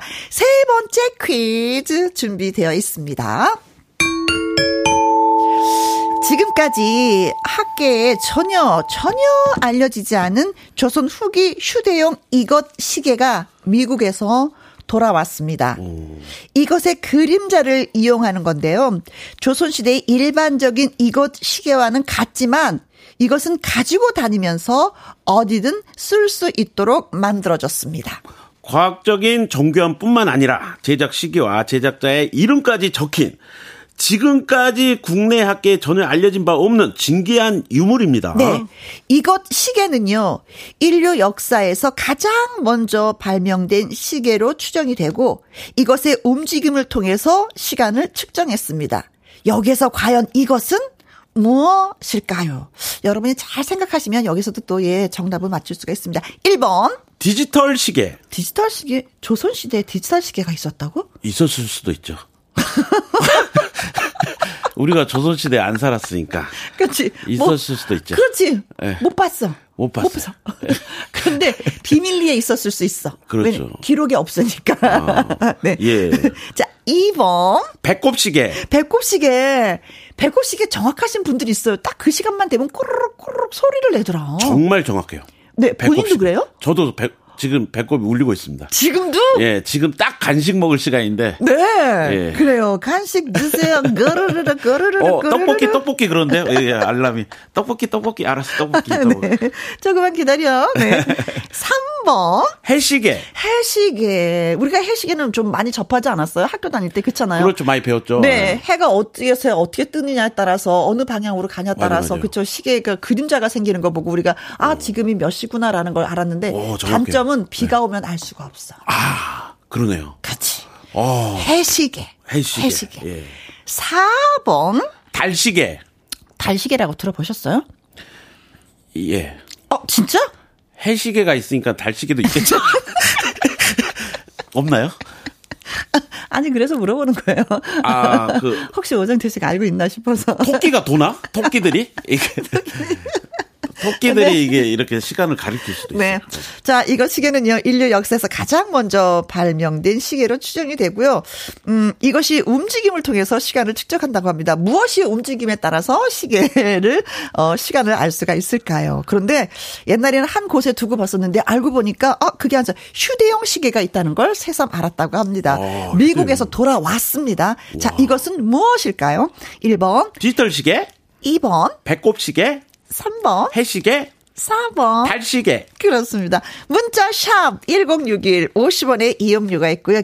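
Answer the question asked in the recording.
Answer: 3: 해시계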